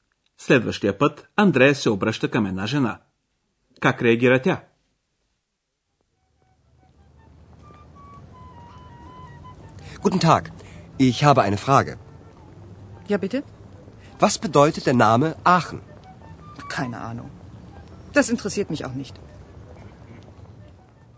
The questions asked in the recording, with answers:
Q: Как реагира тя?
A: Жената отговаря, че няма представа.